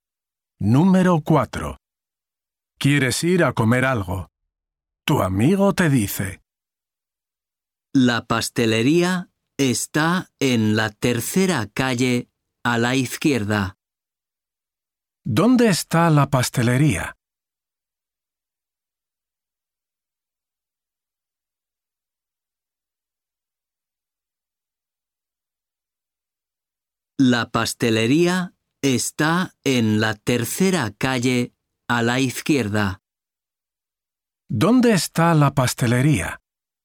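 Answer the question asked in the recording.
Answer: en la tercera calle a la izquierda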